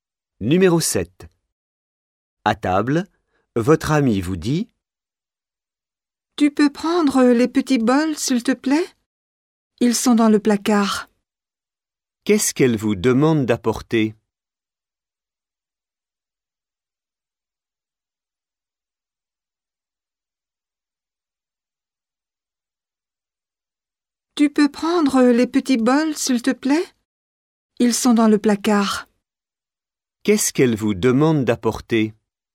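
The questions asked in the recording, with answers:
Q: Qu'est-ce qu'elle vous demande d'apporter?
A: Les petits bols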